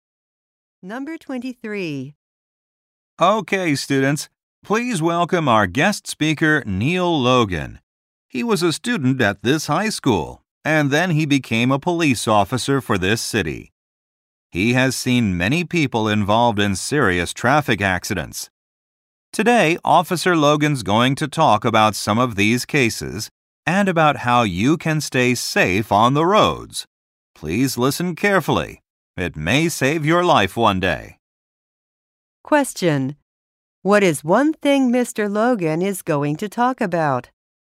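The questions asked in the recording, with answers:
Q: Logan is going to talk about?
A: Traffic accidents and how to stay safe on the roads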